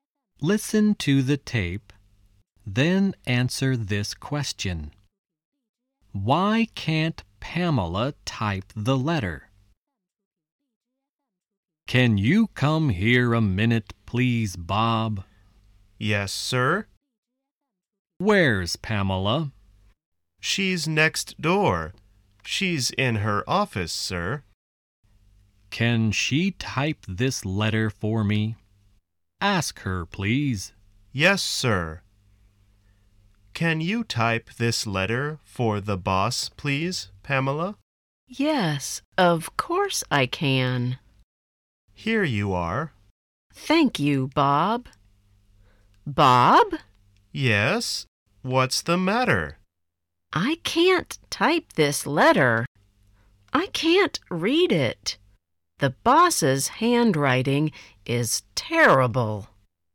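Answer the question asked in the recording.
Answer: Because she can't read it; the boss's handwriting is terrible.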